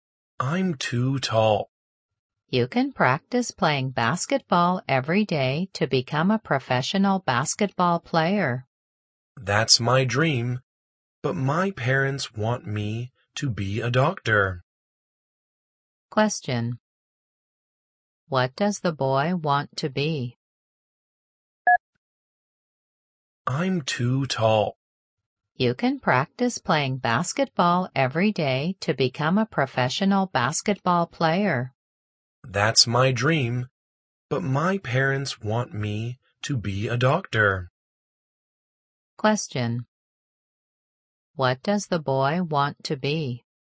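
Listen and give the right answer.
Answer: A professional basketball player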